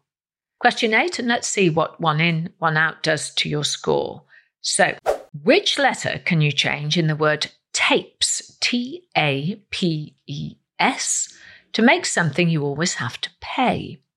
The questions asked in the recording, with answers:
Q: So, which letter can you change in the word tapes, T-A-P-E-S, to make something you always have to pay?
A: Well, change the letter P for the letter X and you get the word taxes, T-A-X-E-S.